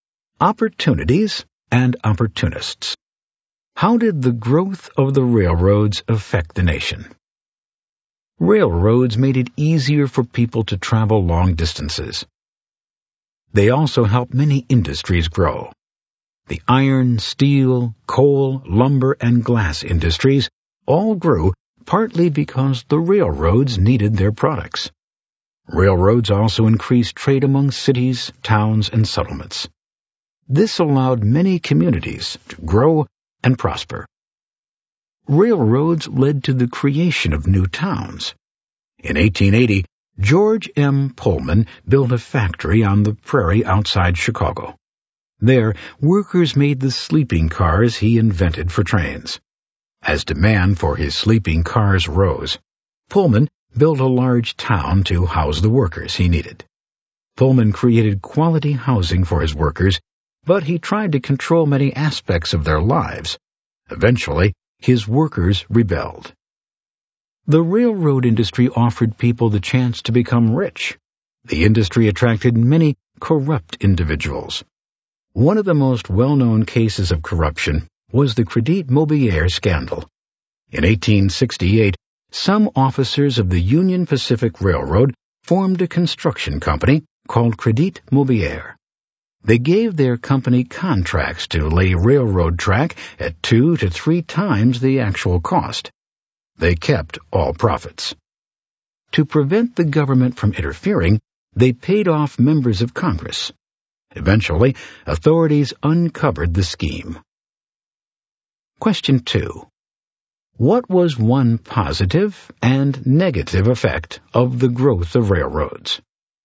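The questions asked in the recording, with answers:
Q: What was one positive and negative effect of the growth of railroads?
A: Positive: helped industries and trade grow; negative: attracted corruption such as the Crédit Mobilier scandal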